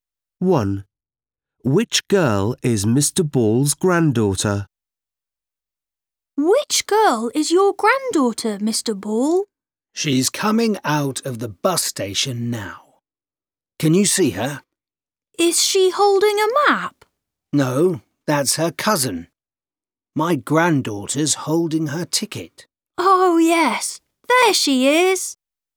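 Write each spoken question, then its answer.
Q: Which girl is Mr. Ball's granddaughter?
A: The girl holding her ticket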